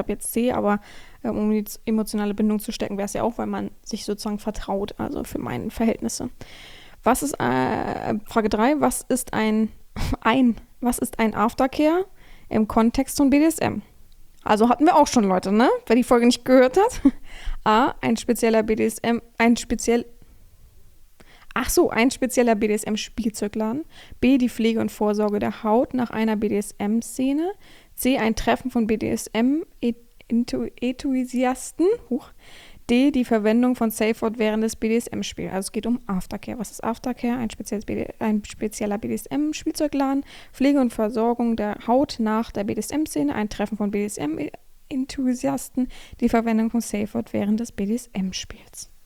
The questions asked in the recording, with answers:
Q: was ist ein Aftercare im Kontext von BDSM?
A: Antwort 3, B, die Pflege und Versorgung der Haut nach einer BDSM-Szene, richtig.